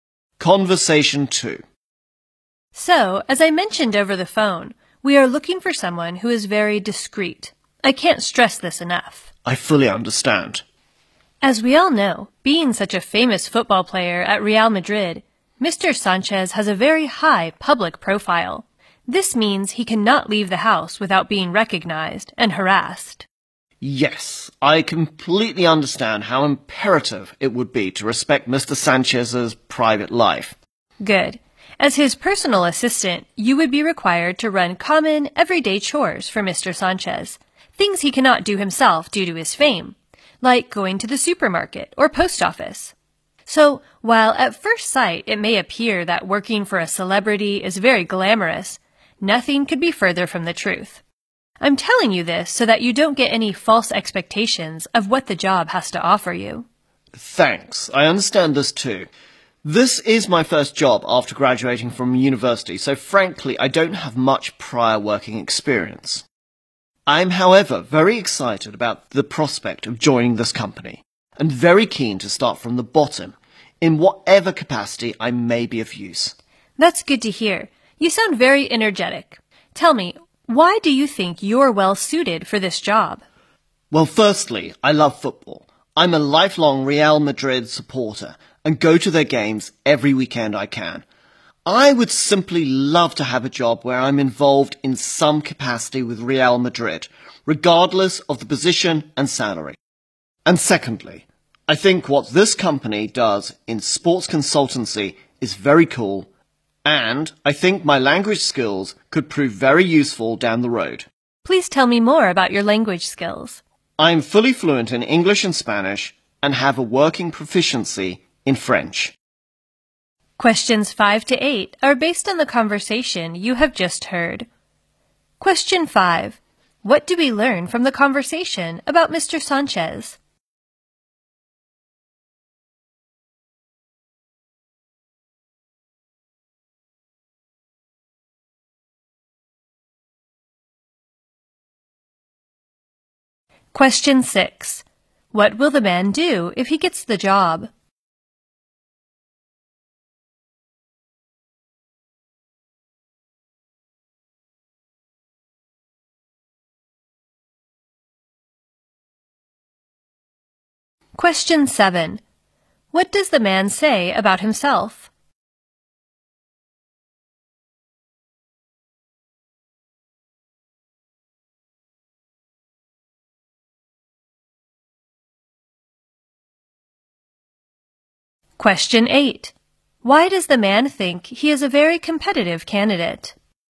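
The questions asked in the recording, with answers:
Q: What will the man do if he gets the job?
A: Run everyday chores for Mr. Sanchez, like going to the supermarket or post office.

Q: What does the man say about himself?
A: He has just graduated and has little working experience.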